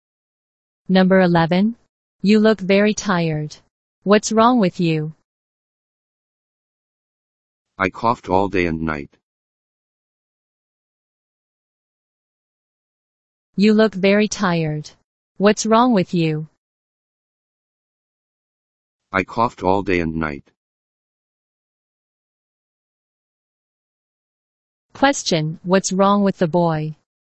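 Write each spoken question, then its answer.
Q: Question, what's wrong with the boy?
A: He coughed all day and night.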